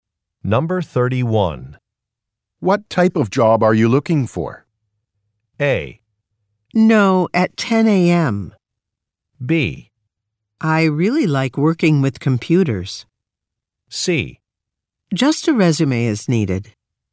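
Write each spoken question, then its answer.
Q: What type of job are you looking for?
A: B: I really like working with computers.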